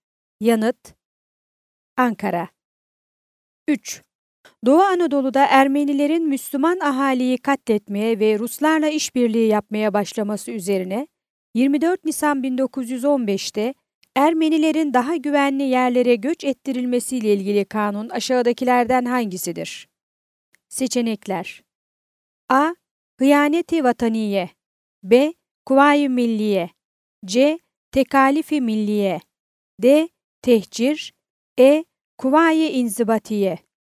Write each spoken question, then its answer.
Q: Doğu Anadolu'da Ermenilerin Müslüman ahaliyi katletmeye ve Ruslarla işbirliği yapmaya başlaması üzerine 24 Nisan 1915'te Ermenilerin daha güvenli yerlere göç ettirilmesiyle ilgili kanun aşağıdakilerden hangisidir?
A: Yanıt: Diyarbakır.